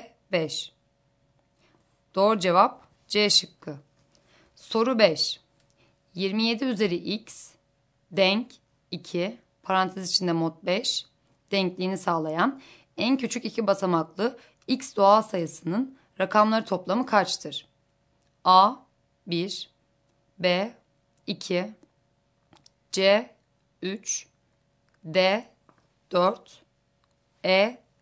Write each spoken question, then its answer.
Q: 27 üzeri x denk 2 parantez içinde mod 5 denkliğini sağlayan en küçük iki basamaklı x doğal sayısının rakamları toplamı kaçtır?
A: Doğru cevap D şıkkı.